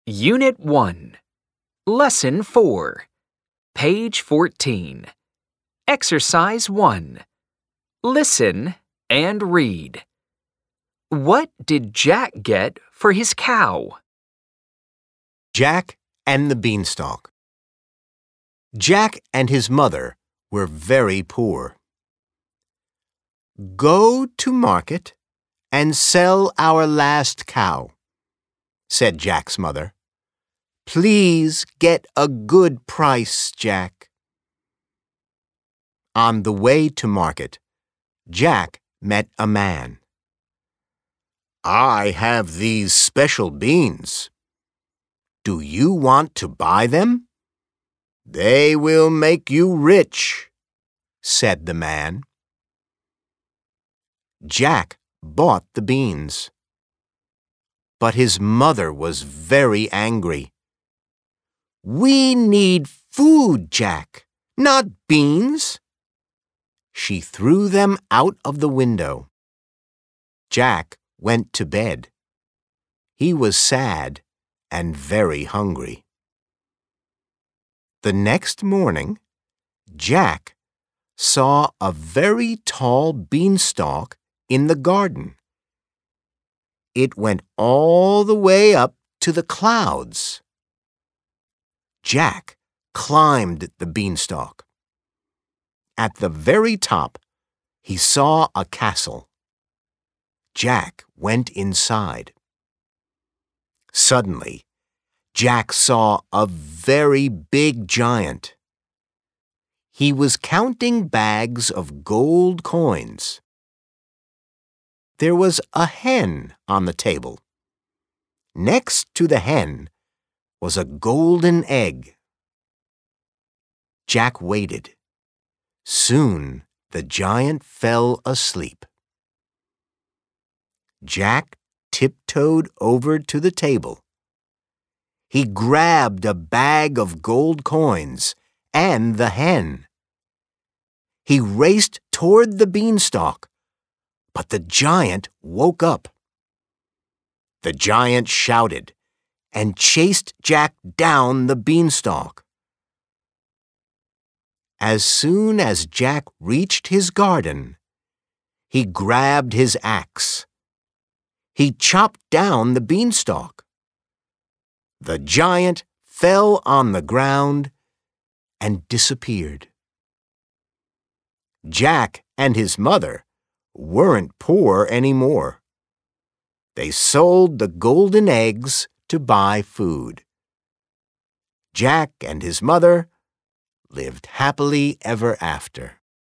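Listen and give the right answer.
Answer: Special beans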